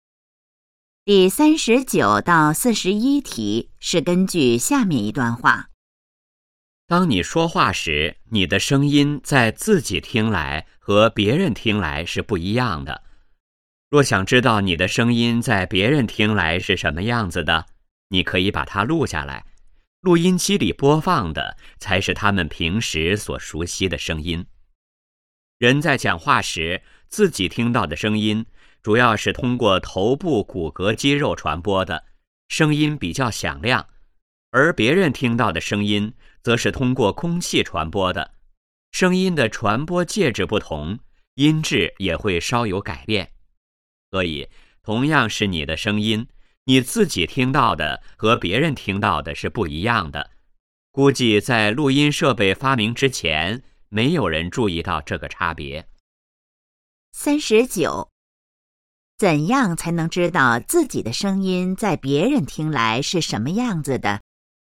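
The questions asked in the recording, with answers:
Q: 怎样才能知道自己的声音在别人听来是什么样子的?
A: 把声音录下来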